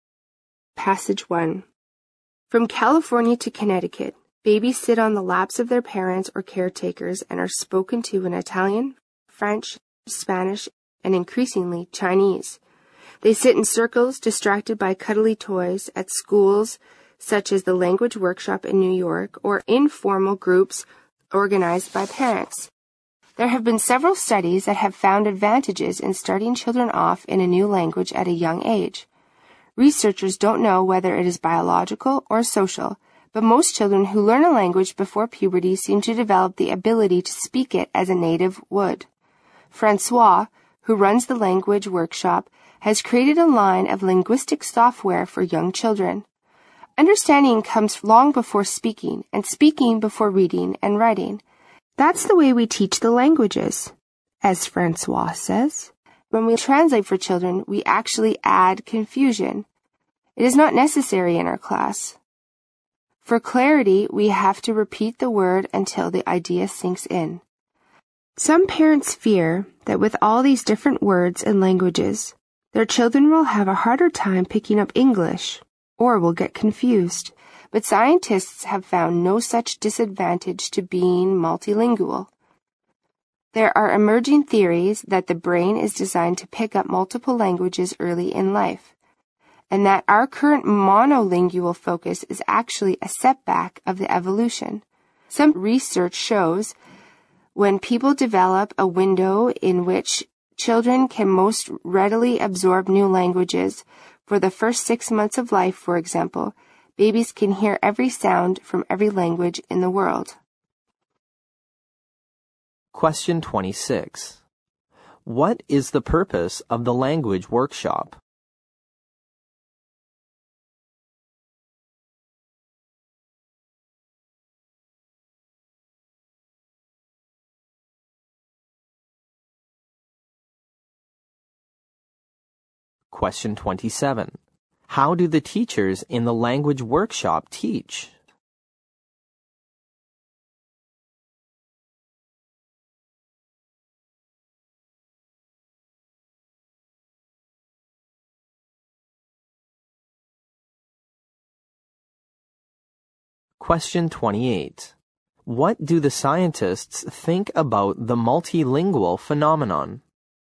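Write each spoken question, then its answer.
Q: What do the scientists think about the multilingual phenomenon?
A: It has no disadvantage; the brain is designed to pick up multiple languages early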